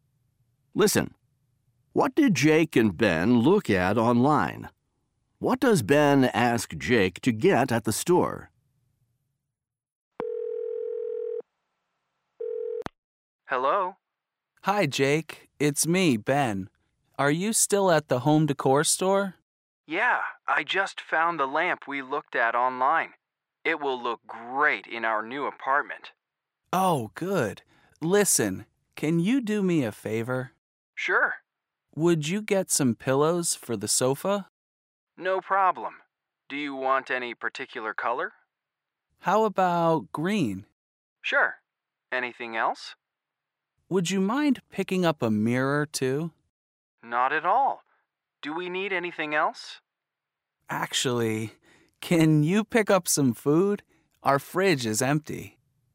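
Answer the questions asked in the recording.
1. A lamp
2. Pillows for the sofa and a mirror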